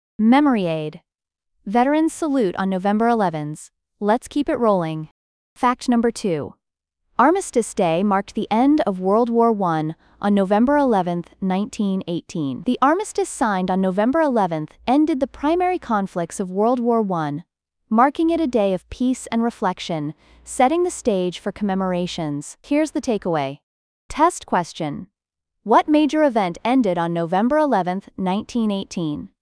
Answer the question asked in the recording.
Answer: World War I.